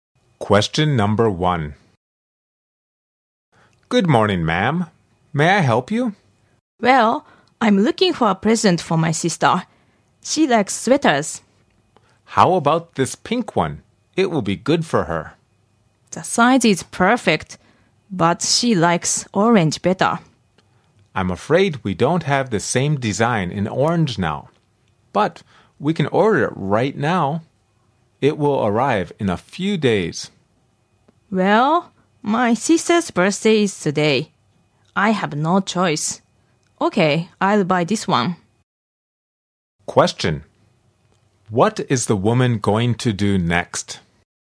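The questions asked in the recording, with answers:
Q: What is the woman going to do next?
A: Buy the pink sweater for her sister.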